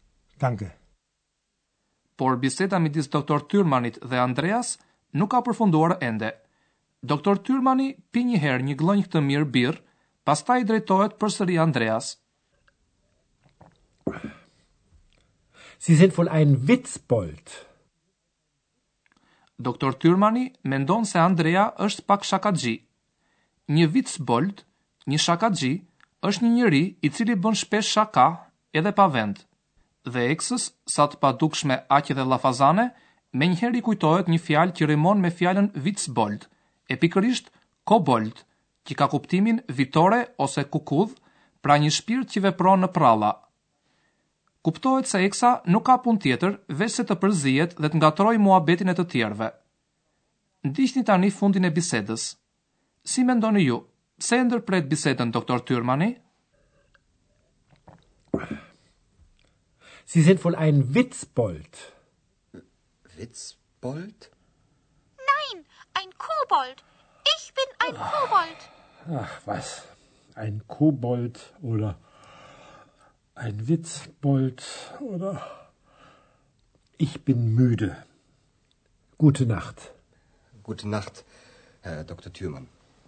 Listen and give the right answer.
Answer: e përfundon bisedën sepse është i lodhur.